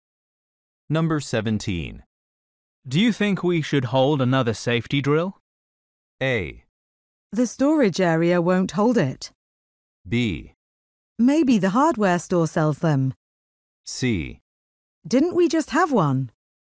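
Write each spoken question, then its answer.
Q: Do you think we should hold another safety drill?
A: C: Didn't we just have one?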